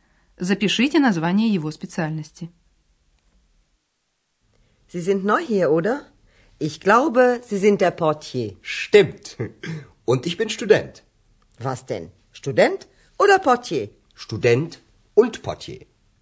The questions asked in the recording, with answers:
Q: Кем работает Андреас?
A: Он администратор гостиницы «портье».